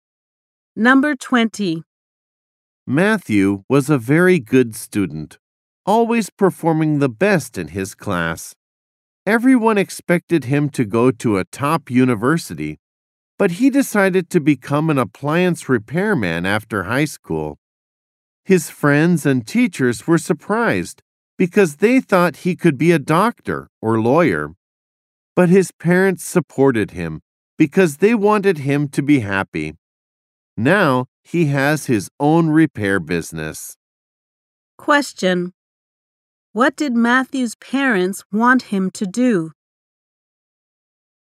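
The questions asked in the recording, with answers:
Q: Question: What did Matthew's parents want him to do?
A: To be happy.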